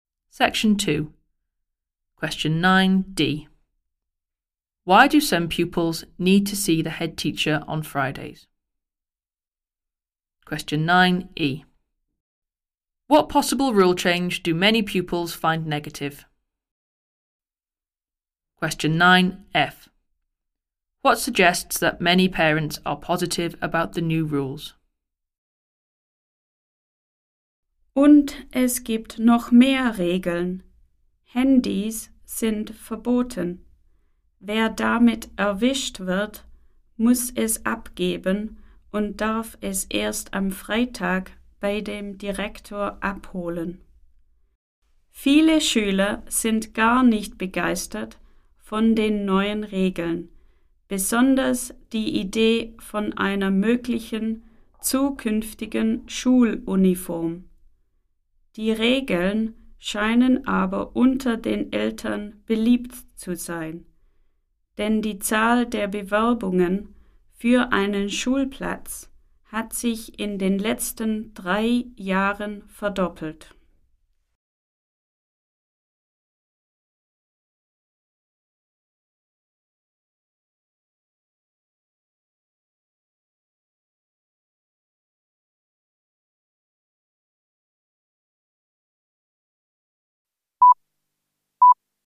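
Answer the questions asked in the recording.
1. To collect their confiscated mobile phones
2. A possible future school uniform
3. Applications for places have doubled in the last 3 years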